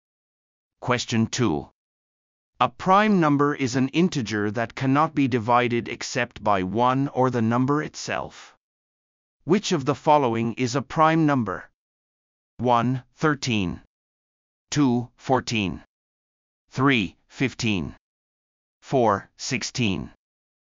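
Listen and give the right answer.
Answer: 1: 13.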